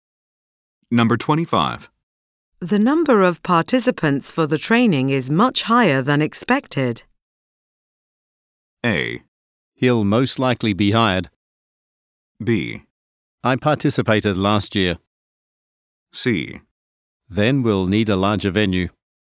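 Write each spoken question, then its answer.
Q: The number of participants for the training is much higher than expected.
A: C: Then we'll need a larger venue.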